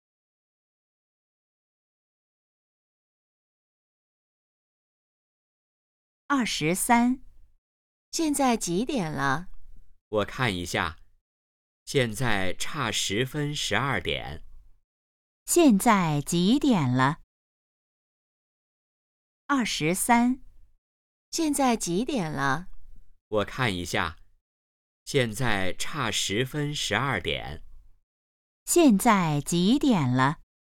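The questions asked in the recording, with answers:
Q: 现在几点了?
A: 十一点五十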